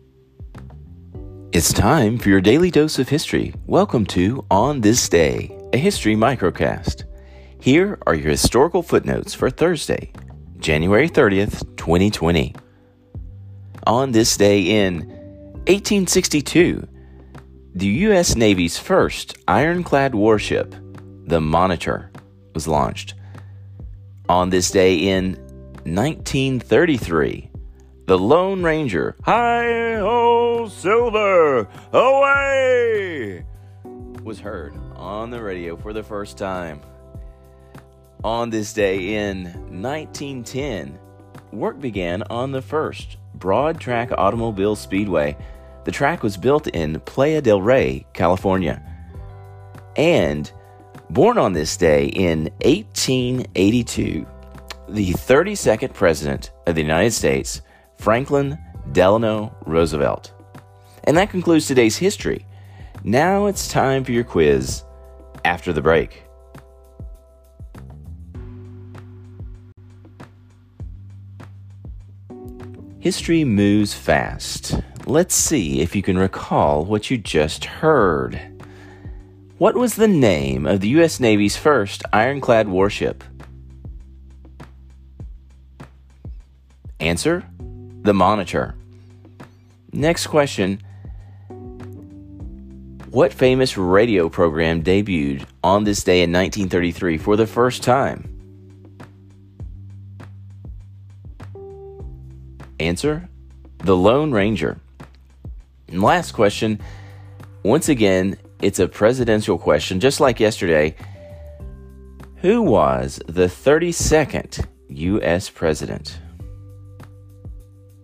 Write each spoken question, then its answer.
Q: What was the name of the U.S. Navy's first ironclad warship?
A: Answer The Monitor.

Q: Who was the 32nd U.S. president?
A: Answer Franklin Delano Roosevelt.